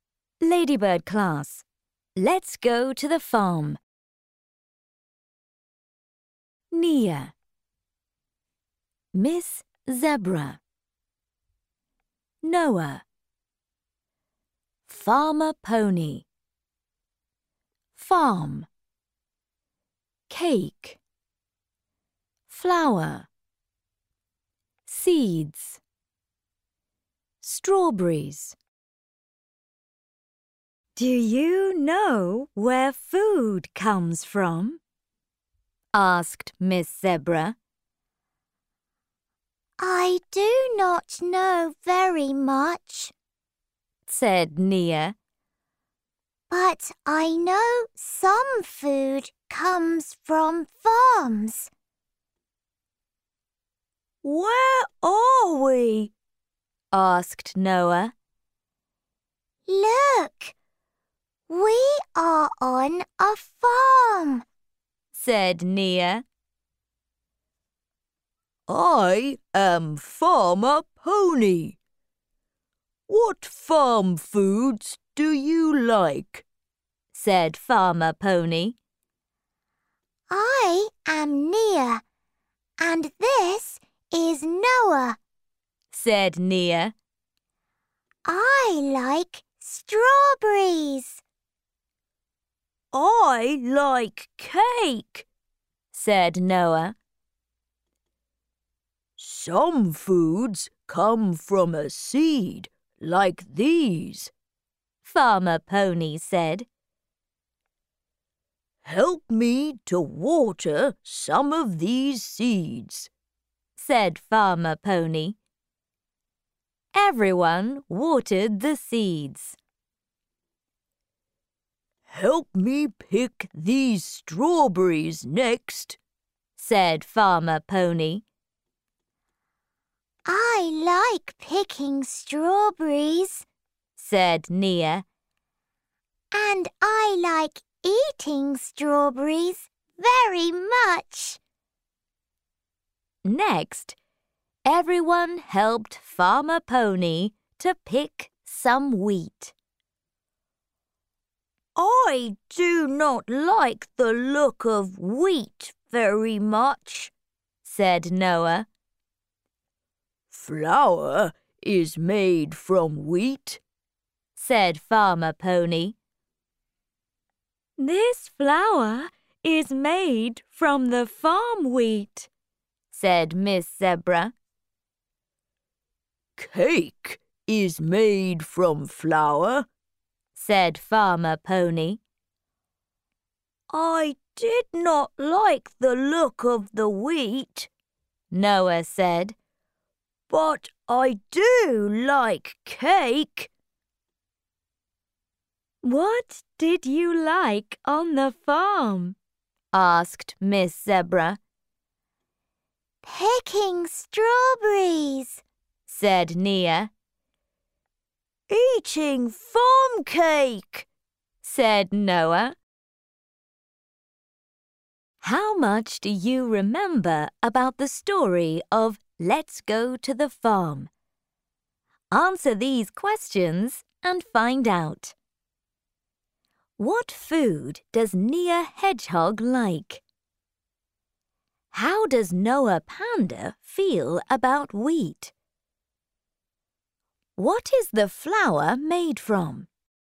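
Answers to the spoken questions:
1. Strawberries
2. He does not like the look of it
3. Wheat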